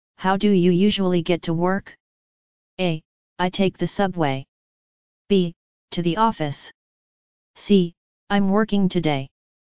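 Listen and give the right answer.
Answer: A: I take the subway.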